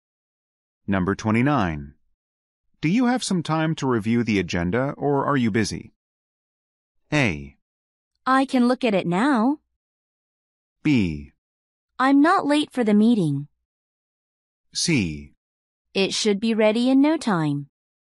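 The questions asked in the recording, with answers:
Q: Do you have some time to review the agenda or are you busy?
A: A: I can look at it now.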